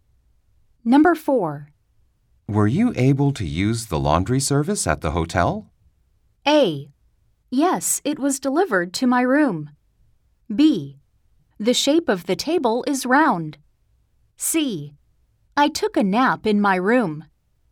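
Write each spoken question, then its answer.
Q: Were you able to use the laundry service at the hotel?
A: A: Yes, it was delivered to my room.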